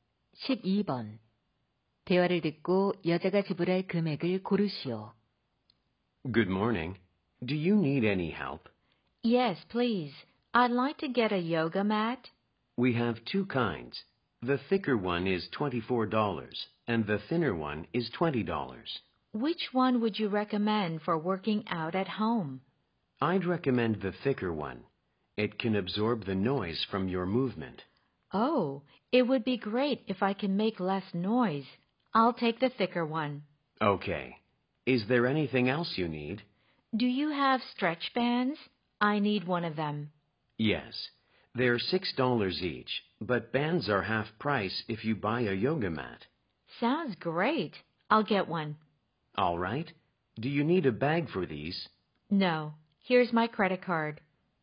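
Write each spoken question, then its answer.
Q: 대화를 듣고 여자가 지불할 금액을 고르시오.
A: $27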